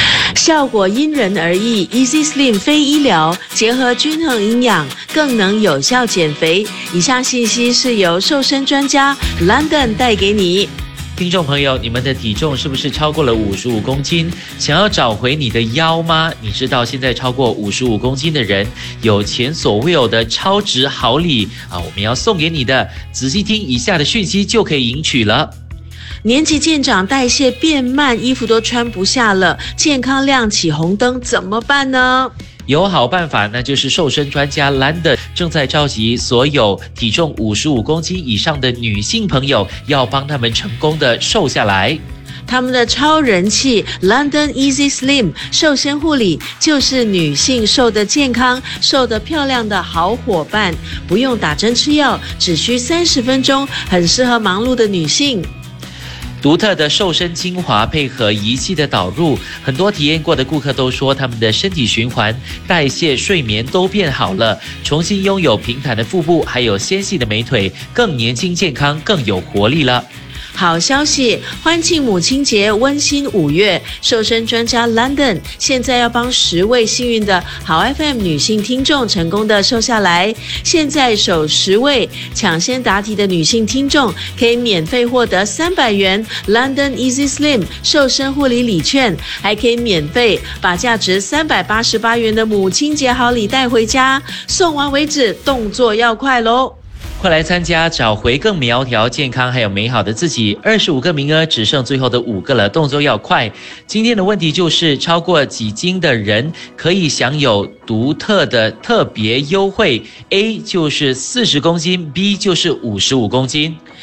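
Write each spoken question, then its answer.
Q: 今天的问题就是,超过几斤的人可以享有独特的特别优惠。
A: B: 55公斤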